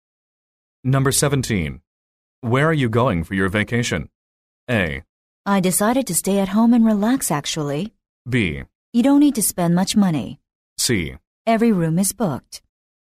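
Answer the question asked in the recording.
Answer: A: I decided to stay at home and relax, actually.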